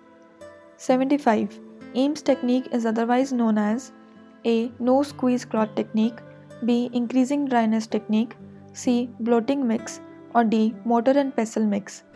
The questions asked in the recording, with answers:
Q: Ames technique is otherwise known as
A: Correct answer is A, that is no squeeze clot technique